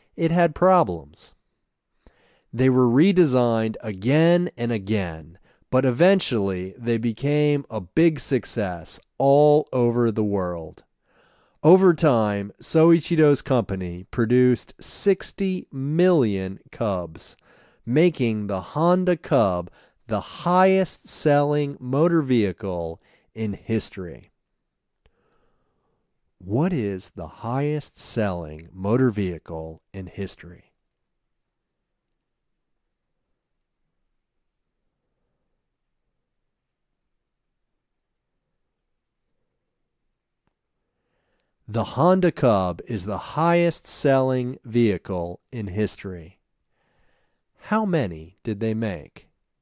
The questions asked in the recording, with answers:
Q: How many did they make?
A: They made 60 million Cubs.